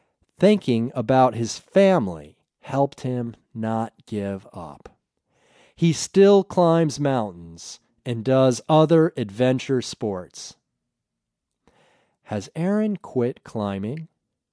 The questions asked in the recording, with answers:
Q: Has Aaron quit climbing?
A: No, Aaron hasn't quit climbing mountains.